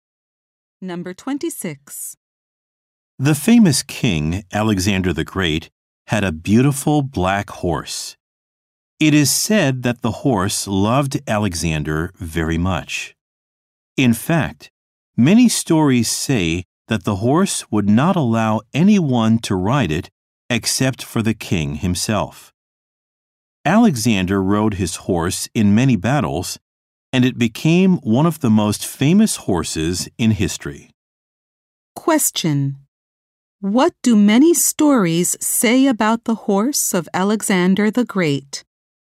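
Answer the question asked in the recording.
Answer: It would not let anyone but the king ride it.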